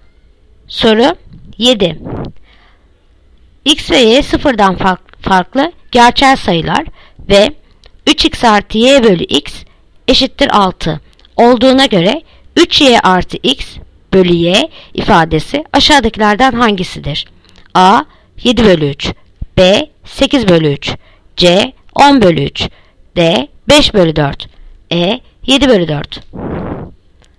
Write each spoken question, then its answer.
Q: X ve Y sıfırdan farklı gerçel sayılar ve 3X artı Y bölü X eşittir 6 olduğuna göre 3Y artı X bölü Y ifadesi aşağıdakilerden hangisidir?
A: Yanıt Ceyhan 10 bölü 3.